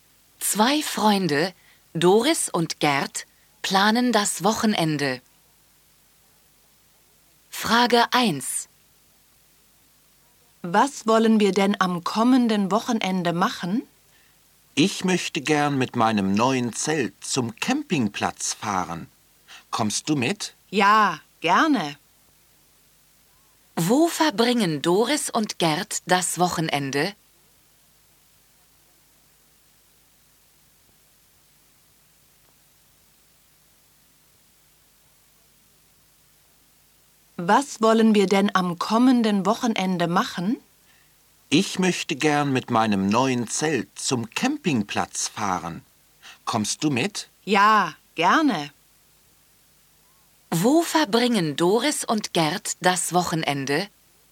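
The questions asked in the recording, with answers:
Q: Wo verbringen Doris und Gerd das Wochenende?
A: Auf dem Campingplatz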